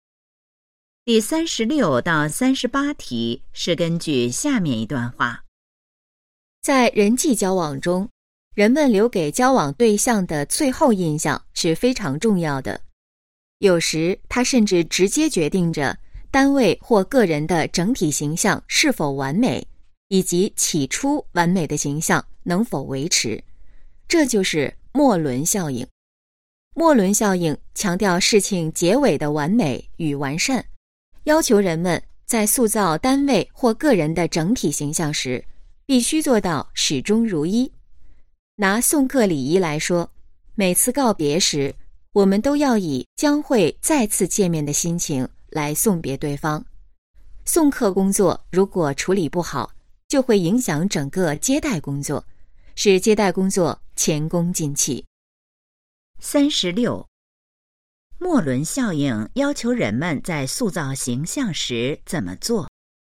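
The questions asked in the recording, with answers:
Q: 莫伦效应要求人们在塑造形象时怎么做?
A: 必须做到始终如一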